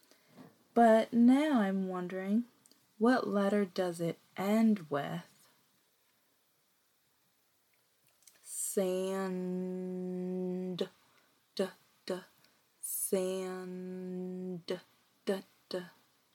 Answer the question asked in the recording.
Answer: Did you say D?